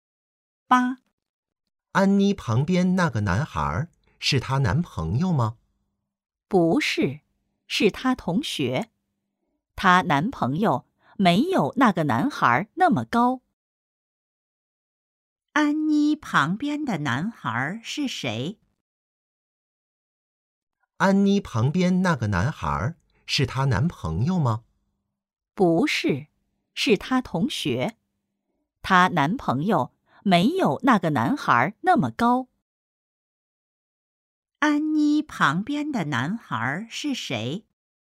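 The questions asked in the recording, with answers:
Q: 安妮旁边的男孩是谁?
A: 她同学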